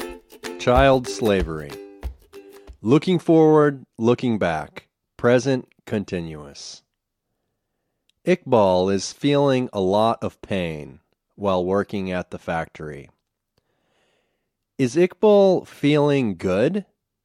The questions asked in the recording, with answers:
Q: Is Iqbal feeling good?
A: No, he isn't feeling good.